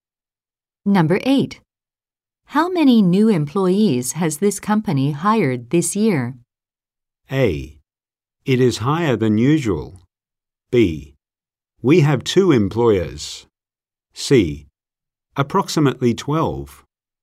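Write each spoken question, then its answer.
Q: How many new employees has this company hired this year?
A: C: Approximately 12.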